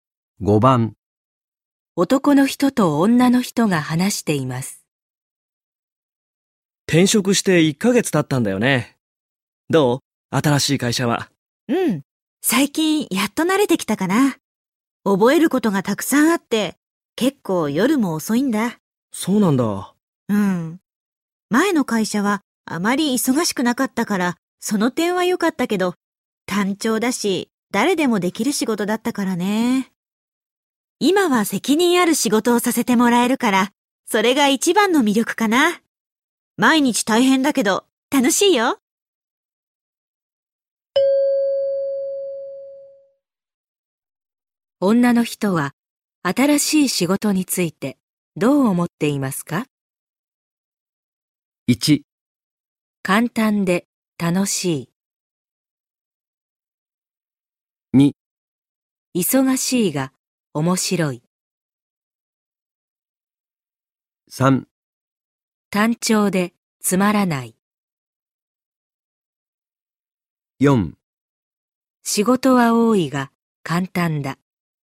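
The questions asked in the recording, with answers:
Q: 女の人は、新しい仕事について、どう思っていますか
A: 2: 忙しいが面白い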